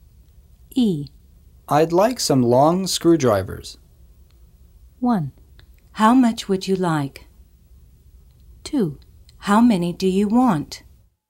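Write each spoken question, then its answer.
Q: I'd like some long screwdrivers.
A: 2: How many do you want?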